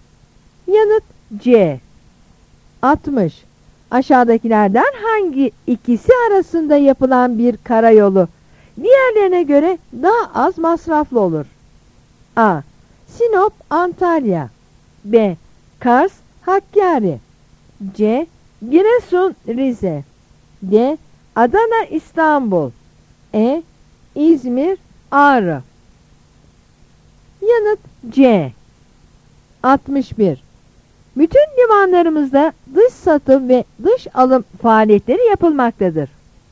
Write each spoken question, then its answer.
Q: Aşağıdakilerden hangi ikisi arasında yapılan bir karayolu diğerlerine göre daha az masraflı olur?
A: Yanıt C.